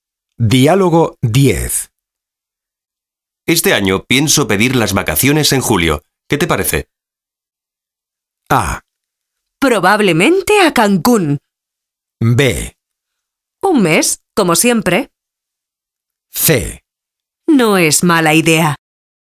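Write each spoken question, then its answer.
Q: ¿Qué te parece?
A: C: No es mala idea.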